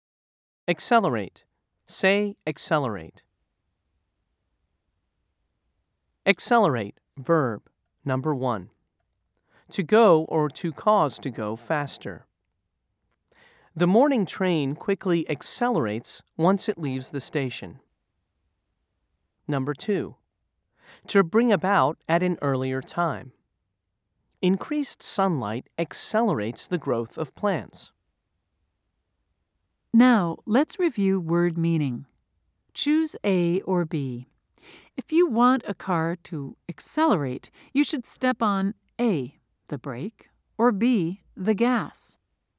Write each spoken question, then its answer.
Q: Choose A or B. If you want a car to accelerate, you should step on A, the brake, or B, the gas.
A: If you said B, you were correct.